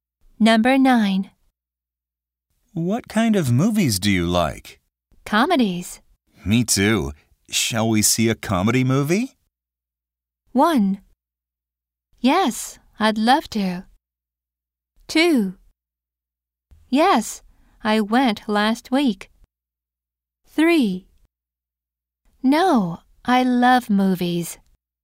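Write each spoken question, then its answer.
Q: Me too. Shall we see a comedy movie?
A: 1: Yes, I'd love to.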